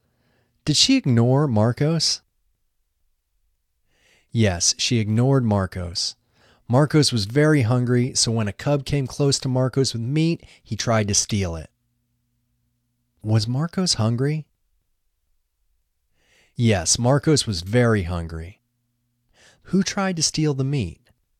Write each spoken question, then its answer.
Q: Who tried to steal the meat?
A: Marcos tried to steal the meat.